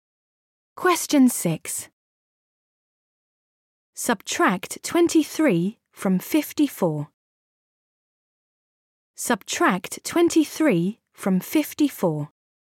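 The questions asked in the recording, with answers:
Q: Subtract 23 from 54.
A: 31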